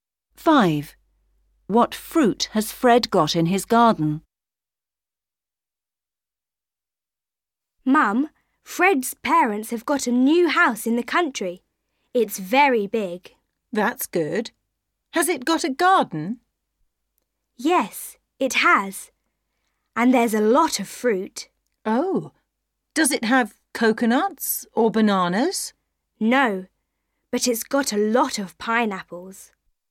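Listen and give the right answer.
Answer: pineapples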